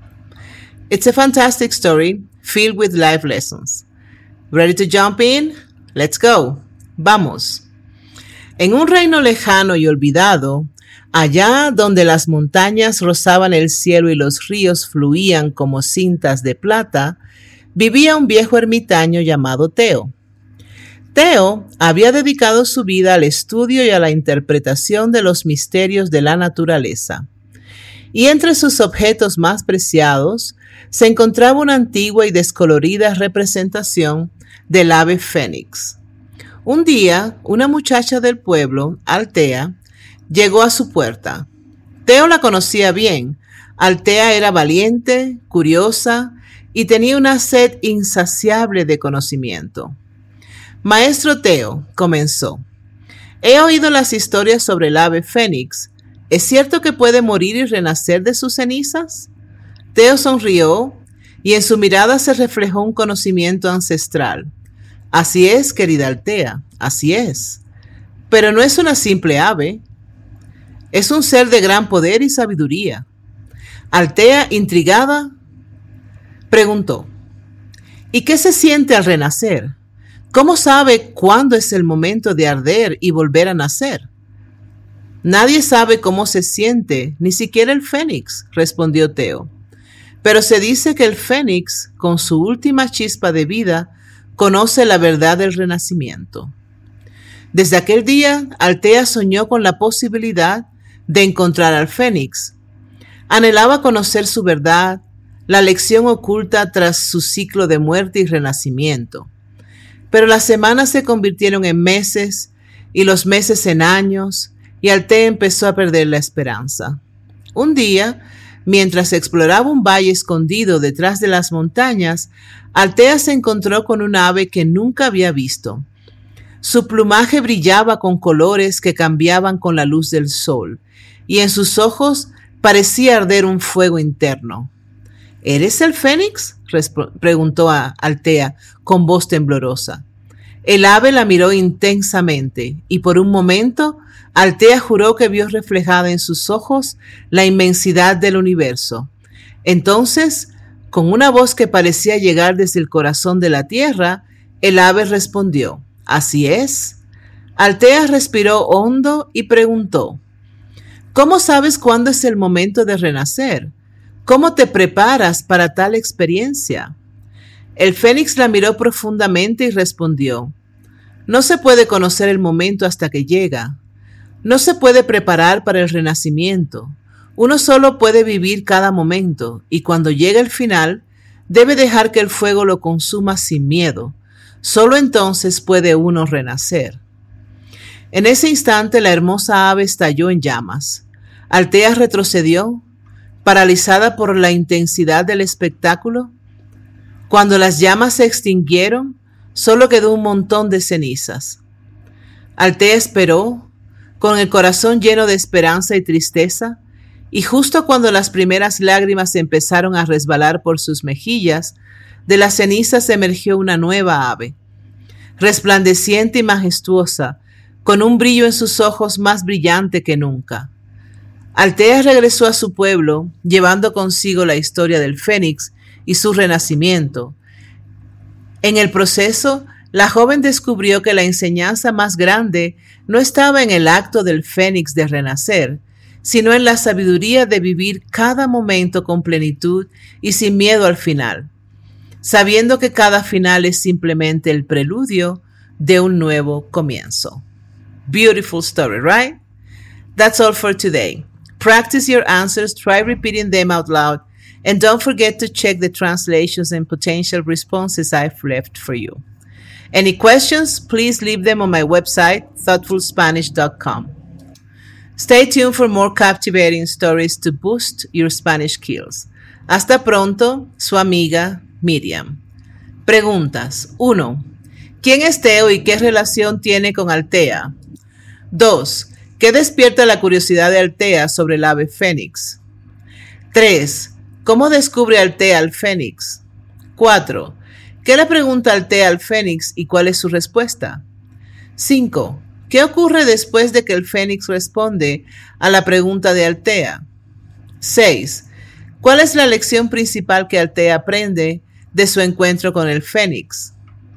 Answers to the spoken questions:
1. Teo es un viejo ermitaño dedicado al estudio de los misterios de la naturaleza y Altea es una joven del pueblo que busca aprender de él.
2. Altea se siente fascinada por la leyenda del Fénix, un ave mitológica que renace de sus propias cenizas.
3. Altea encuentra al Fénix en un valle escondido detrás de las montañas.
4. Altea le pregunta al Fénix cómo sabe cuándo es el momento de renacer, y el Fénix responde que uno no puede conocer el momento hasta que llega y que debe vivir cada momento sin miedo al final.
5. Tras responder a Altea, el fénix arde en llamas y de sus cenizas renace una nueva ave.
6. Altea aprende que la enseñanza más grande no está en el acto de renacer del fénix, sino en la sabiduría de vivir cada momento plenamente y sin miedo al final.